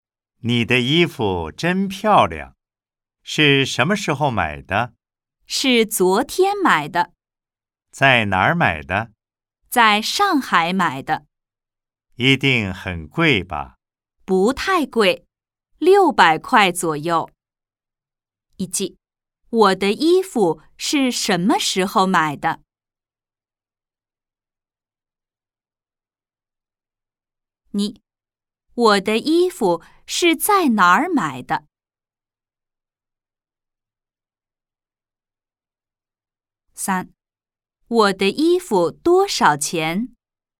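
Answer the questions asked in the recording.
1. 昨天
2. 在上海
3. 600块左右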